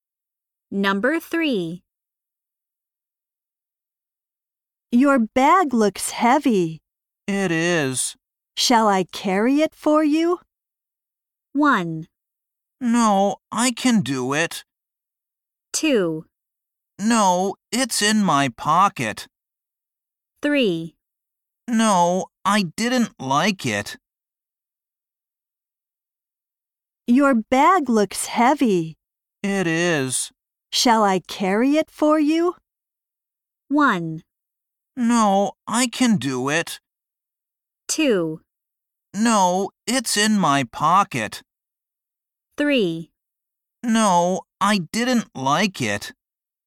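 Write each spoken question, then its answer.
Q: Shall I carry it for you?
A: 1: No, I can do it.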